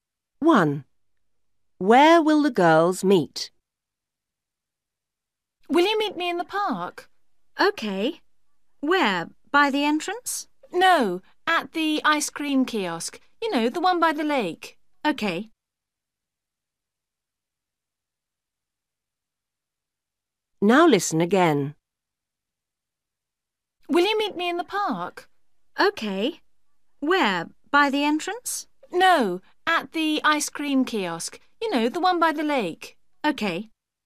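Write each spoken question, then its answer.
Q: Where will the girls meet?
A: At the ice cream kiosk by the lake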